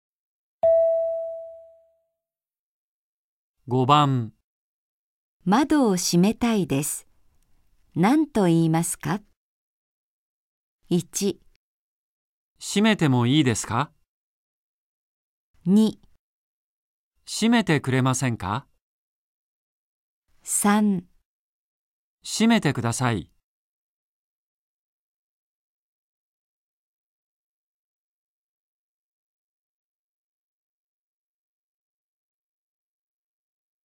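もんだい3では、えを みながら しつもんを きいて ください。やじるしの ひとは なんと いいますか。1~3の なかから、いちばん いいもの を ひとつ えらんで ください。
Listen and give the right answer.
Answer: 閉めてもいいですか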